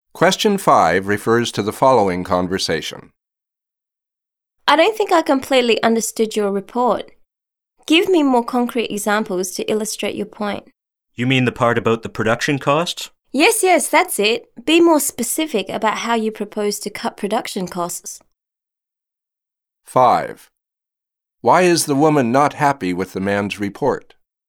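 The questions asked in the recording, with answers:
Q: Why is the woman not happy with the man's report?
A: It lacks concrete examples; it isn't specific enough about how to cut production costs.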